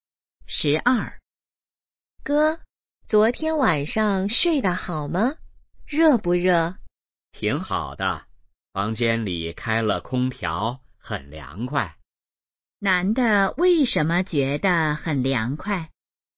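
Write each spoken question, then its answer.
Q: 男的为什么觉得很凉快?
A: 房间里开了空调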